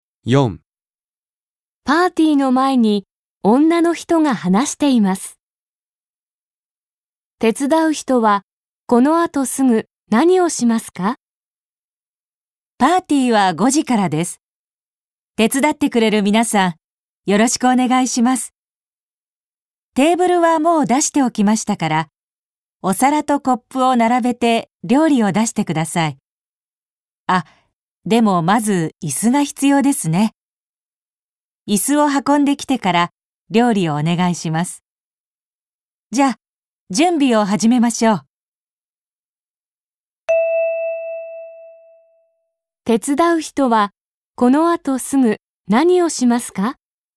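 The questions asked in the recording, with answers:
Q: 手伝う人はこの後すぐ何をしますか?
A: 椅子を運ぶ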